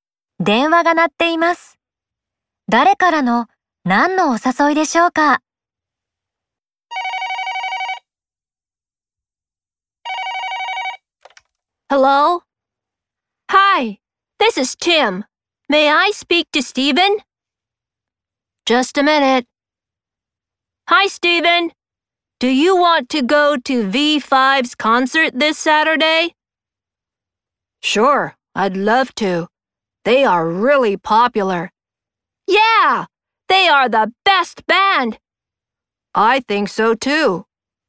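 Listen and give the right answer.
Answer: ティムから、今週土曜日のV5のコンサートへのお誘い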